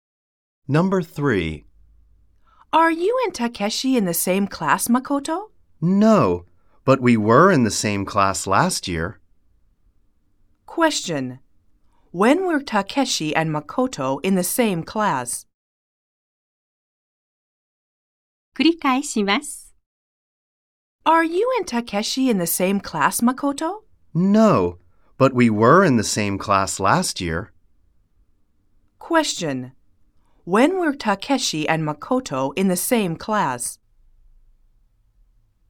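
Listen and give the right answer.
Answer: Last year.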